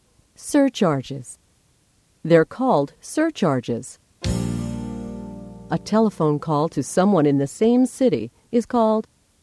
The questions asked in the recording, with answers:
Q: A telephone call to someone in the same city is called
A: a local call. It's called a local call.